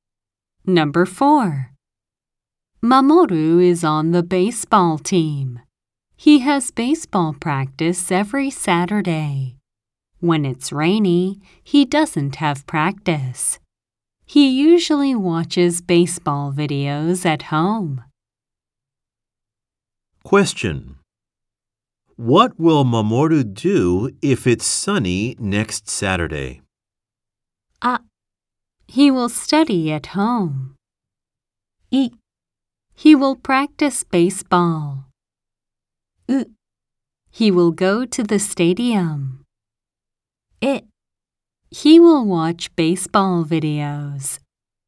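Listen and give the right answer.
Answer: い: He will practice baseball.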